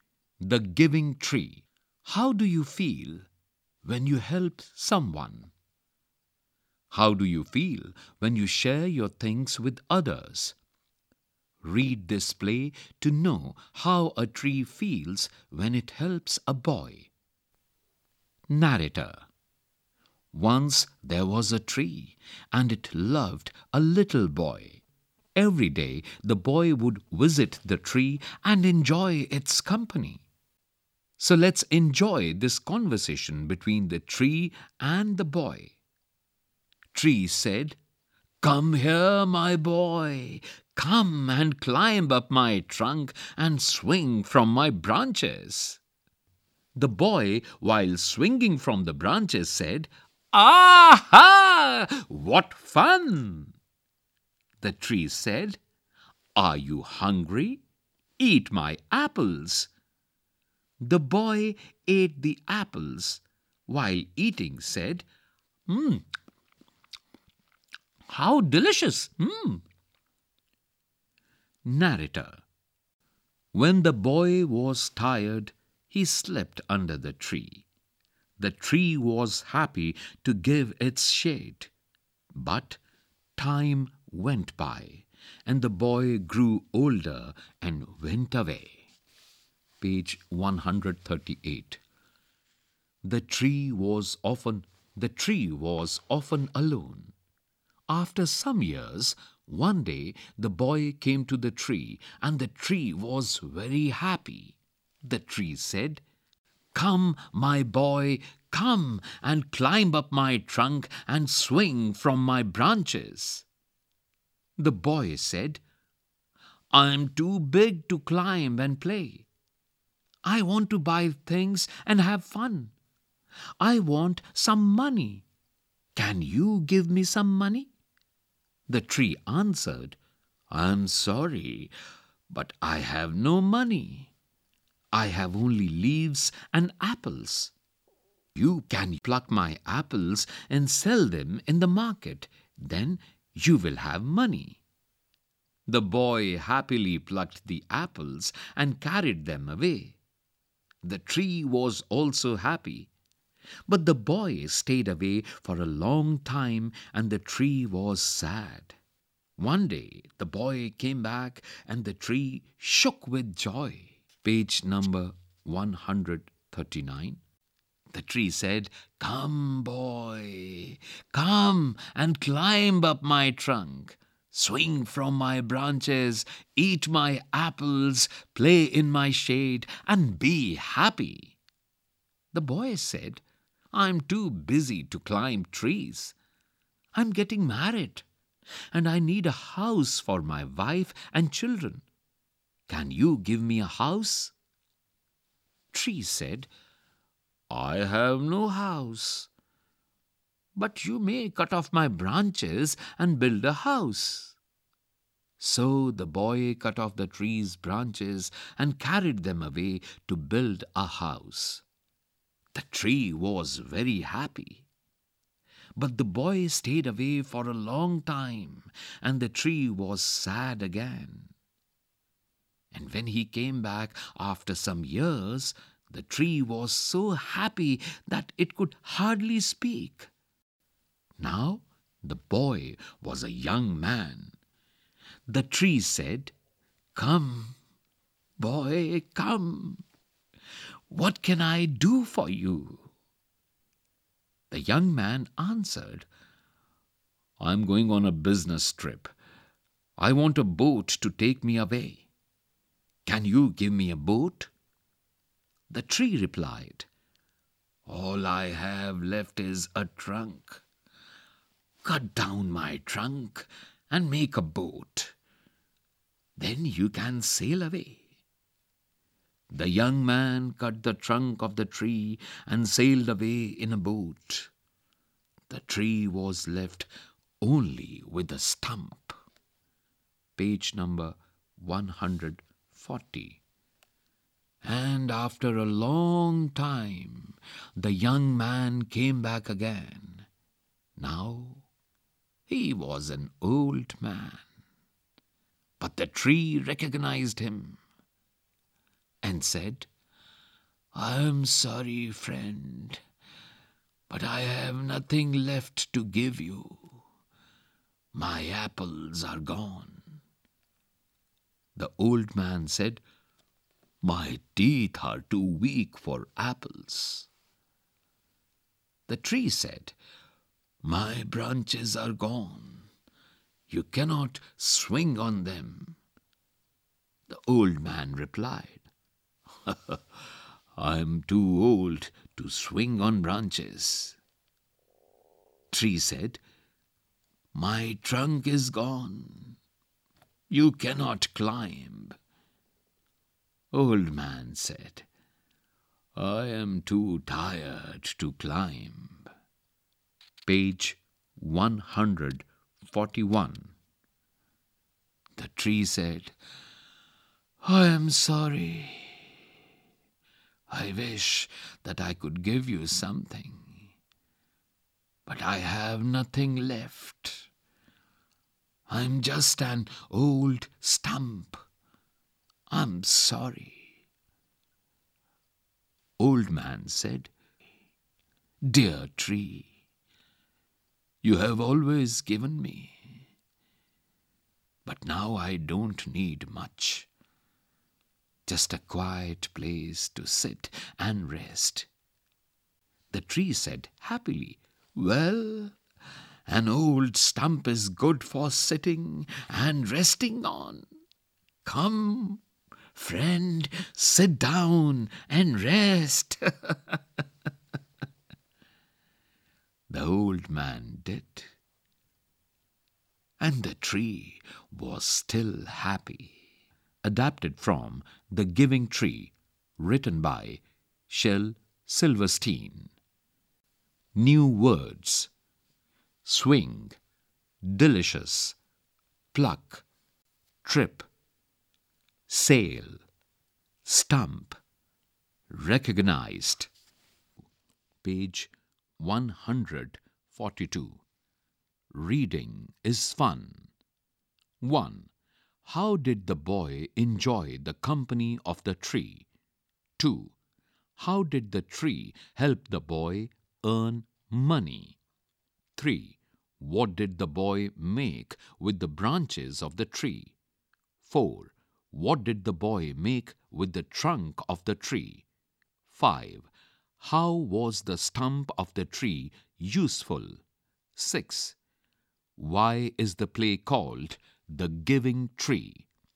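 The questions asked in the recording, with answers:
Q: How did the boy enjoy the company of the tree?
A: He climbed its trunk, swung from its branches, ate its apples and slept in its shade.

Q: How did the tree help the boy earn money?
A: It let him pluck its apples to sell in the market.

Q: What did the boy make with the branches of the tree?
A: A house

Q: What did the boy make with the trunk of the tree?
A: A boat

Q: How was the stump of the tree useful?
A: The old man could sit and rest on it.

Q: Why is the play called The Giving Tree?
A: Because the tree kept giving the boy everything it had.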